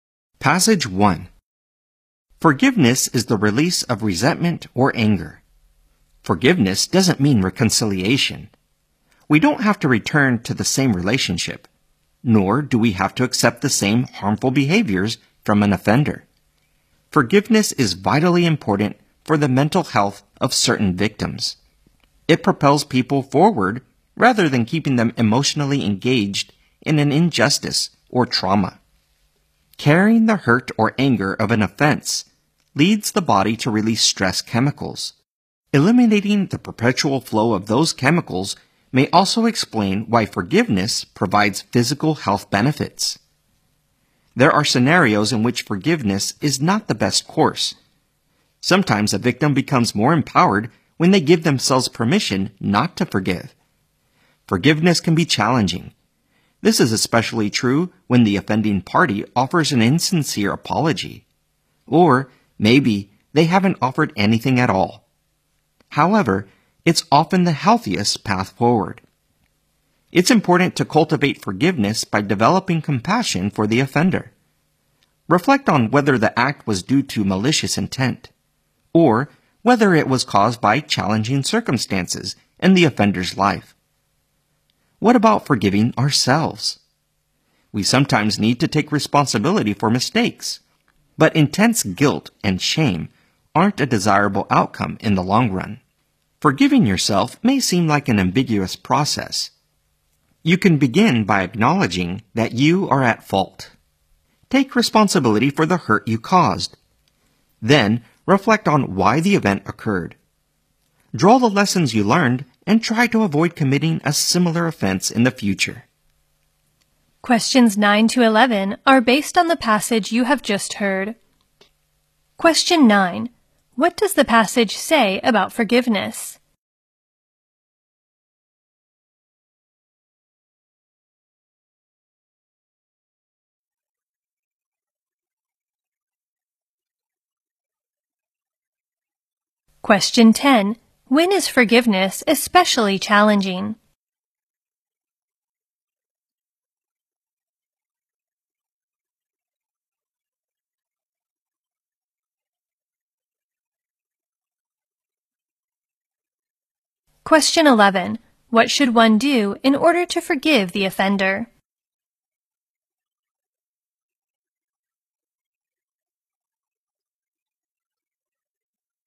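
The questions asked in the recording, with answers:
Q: When is forgiveness especially challenging?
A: When the offender offers an insincere apology or none at all

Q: What should one do in order to forgive the offender?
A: Develop compassion for the offender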